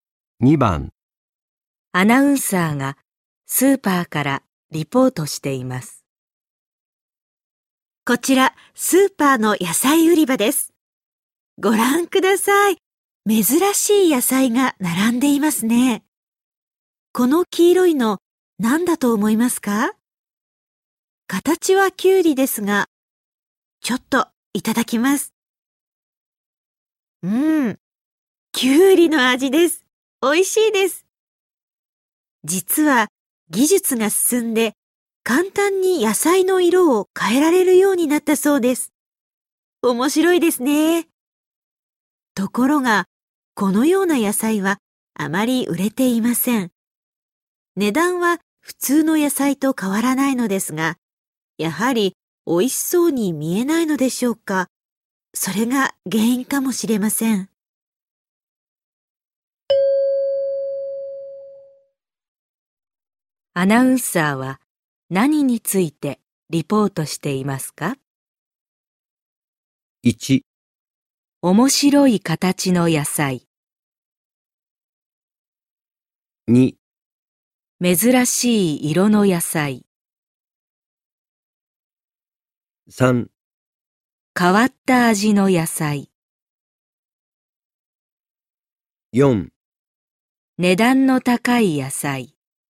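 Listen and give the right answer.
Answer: 2: 珍しい色の野菜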